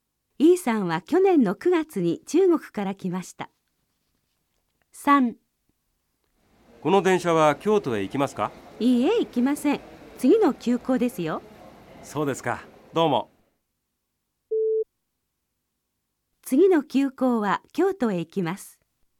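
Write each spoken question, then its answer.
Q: 次の急行は京都へ行きます。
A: 正しい(○)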